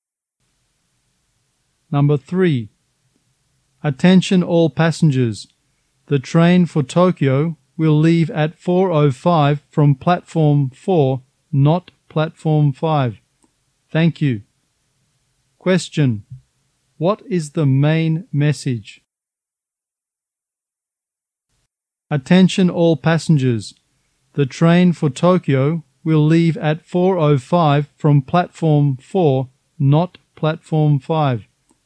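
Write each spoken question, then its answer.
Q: Question. What is the main message?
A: The train for Tokyo will leave from platform 4, not platform 5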